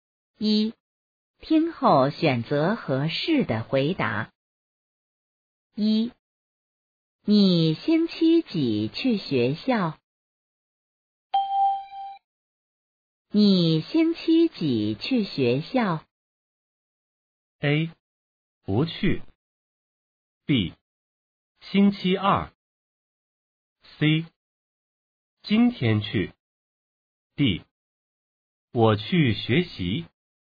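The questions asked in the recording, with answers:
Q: 你星期几去学校?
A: B: 星期二。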